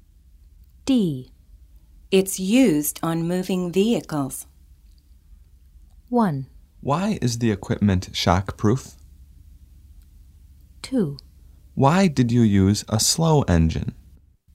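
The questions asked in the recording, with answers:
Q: It's used on moving vehicles.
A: 1: Why is the equipment shockproof?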